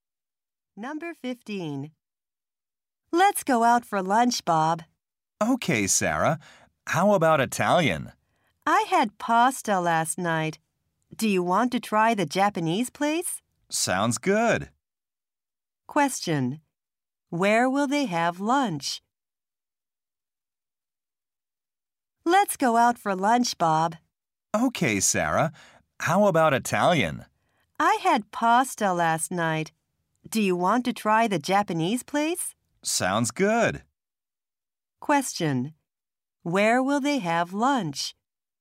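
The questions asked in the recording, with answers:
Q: Where will they have lunch?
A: At a Japanese restaurant.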